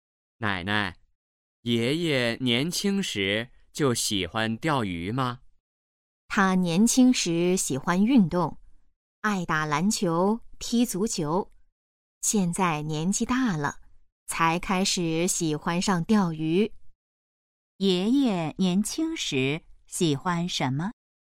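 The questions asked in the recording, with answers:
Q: 爷爷年轻时喜欢什么?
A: 运动(打篮球、踢足球)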